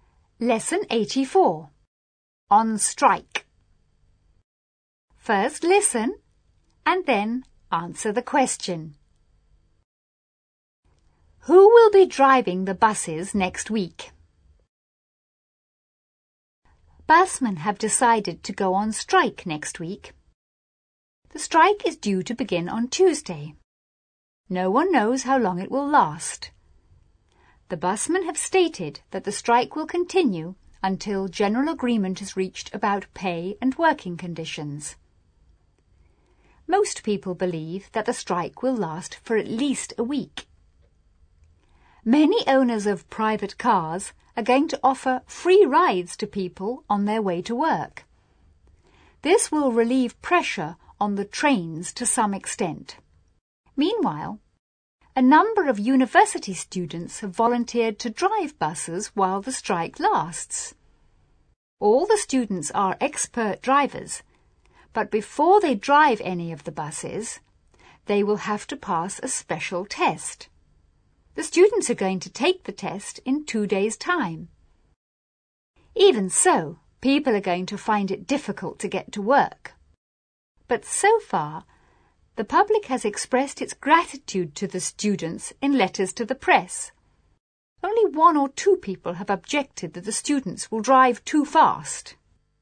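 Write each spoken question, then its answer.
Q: Who will be driving the buses next week?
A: University students who have volunteered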